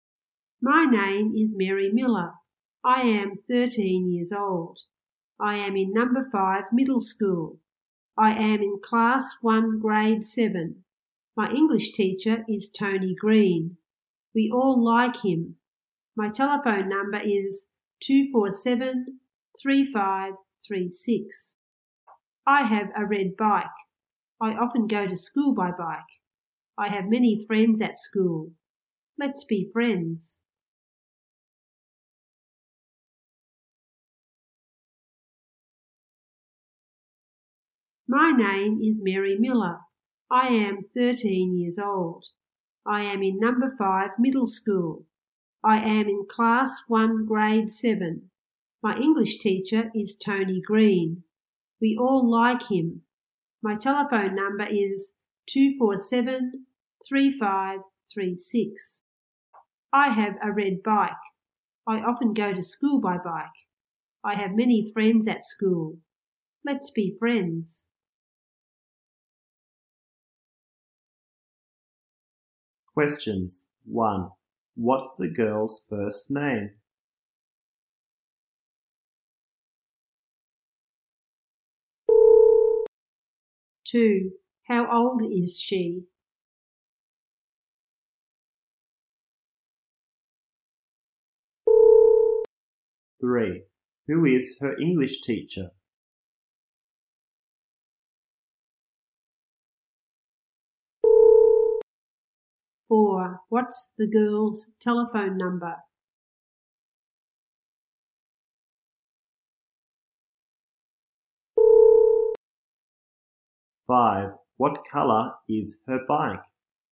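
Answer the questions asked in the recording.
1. Mary
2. 13 years old
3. Tony Green
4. 247-3536
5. Red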